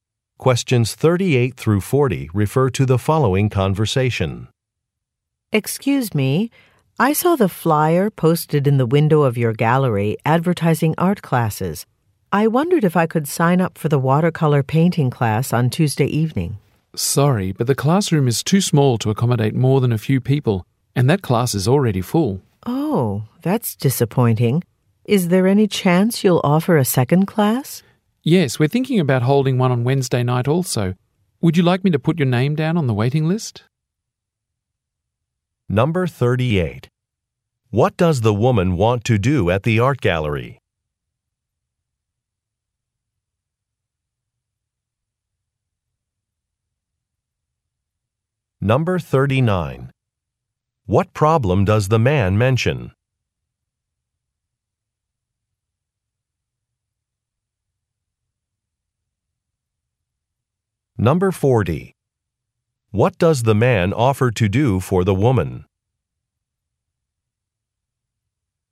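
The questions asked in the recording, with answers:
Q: What does the woman want to do at the art gallery?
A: Sign up for a watercolor painting class

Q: What problem does the man mention?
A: The class is already full

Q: What does the man offer to do for the woman?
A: Put her name on a waiting list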